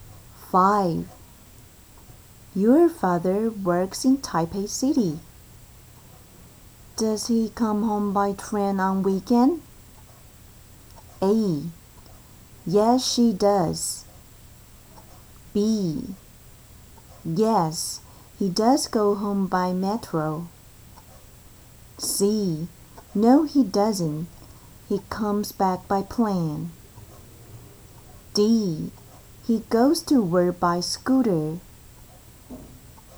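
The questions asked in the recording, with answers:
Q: Does he come home by train on weekend?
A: C: No, he doesn't. He comes back by plane.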